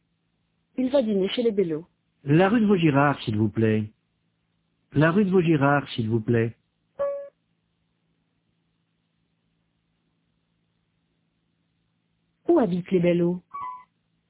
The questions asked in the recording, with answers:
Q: Où habitent les Bellot?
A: Rue de Vaugirard.